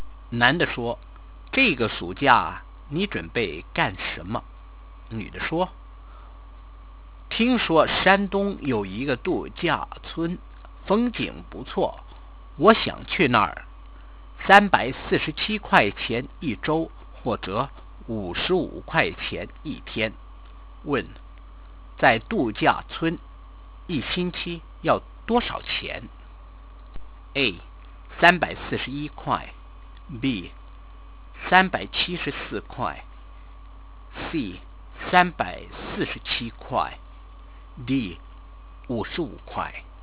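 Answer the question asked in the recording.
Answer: C: 347块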